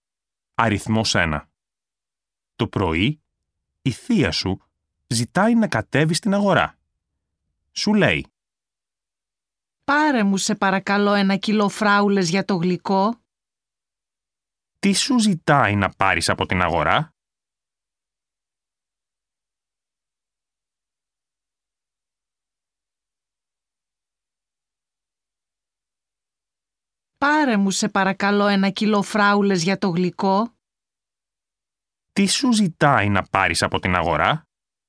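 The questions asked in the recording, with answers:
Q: Τι σου ζητάει να πάρεις από την αγορά?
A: Ένα κιλό φράουλες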